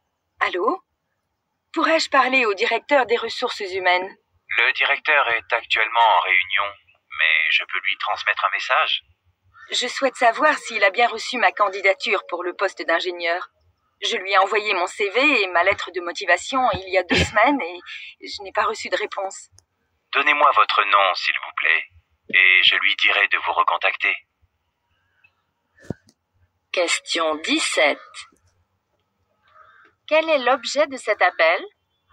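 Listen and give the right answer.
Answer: Savoir si le directeur a bien reçu sa candidature pour le poste d'ingénieur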